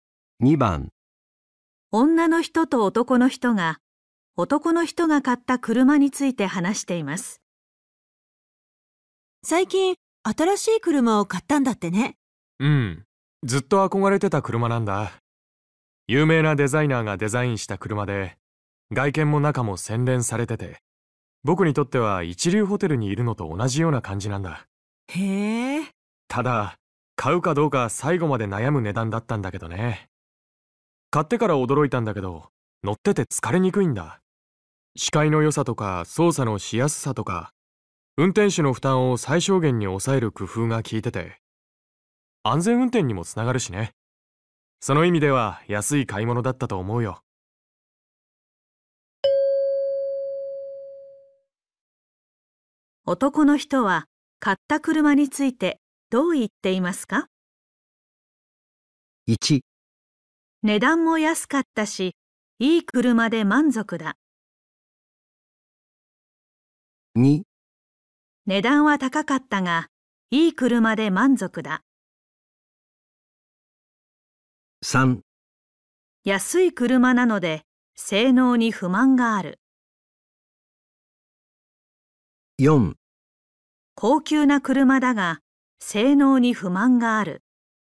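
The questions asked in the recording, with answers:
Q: 男の人は買った車についてどう言っていますか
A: 2: 値段は高かったが、いい車で満足だ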